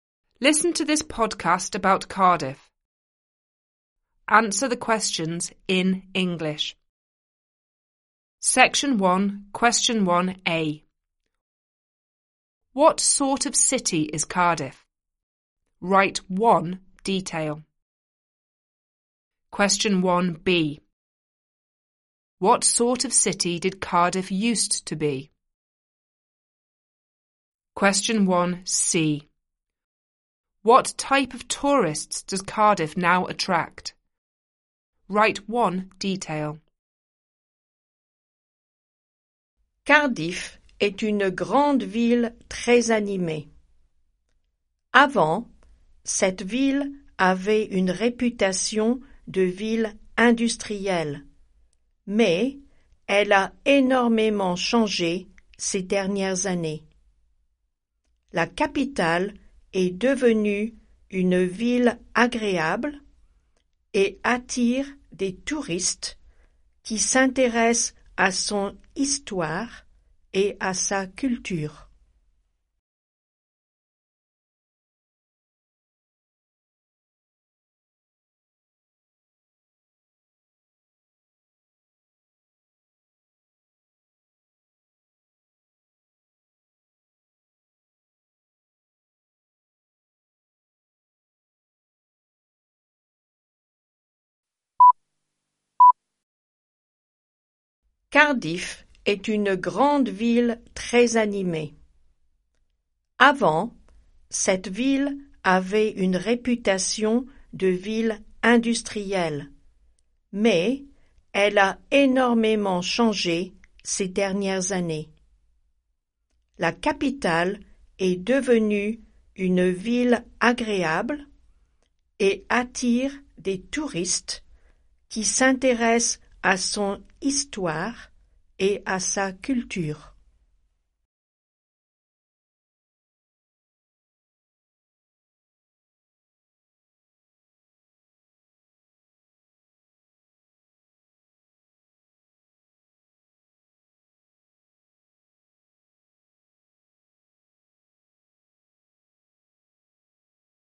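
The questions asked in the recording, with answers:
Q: What sort of city is Cardiff?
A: A big, very lively city

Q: What sort of city did Cardiff used to be?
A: An industrial city

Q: What type of tourists does Cardiff now attract?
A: Tourists interested in its history and culture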